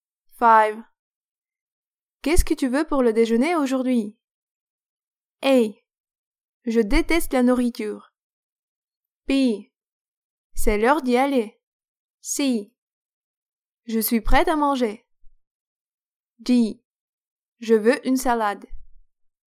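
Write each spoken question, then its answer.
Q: Qu'est-ce que tu veux pour le déjeuner aujourd'hui?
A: D: Je veux une salade.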